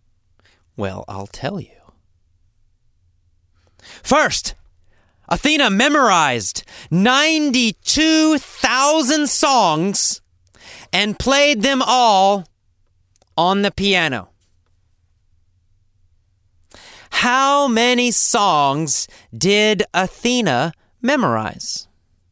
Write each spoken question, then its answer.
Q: How many songs did Athena memorize?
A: She memorized 92,000 songs.